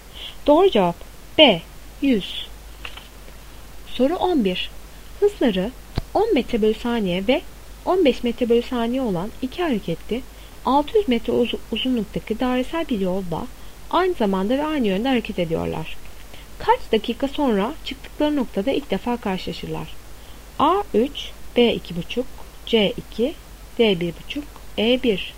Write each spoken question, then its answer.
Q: Kaç dakika sonra çıktıkları noktada ilk defa karşılaşırlar?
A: Doğru cevap C 2.